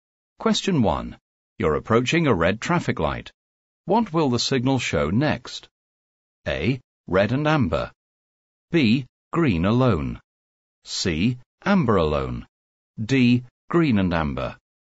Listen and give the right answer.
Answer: The correct answer is A. Red and amber.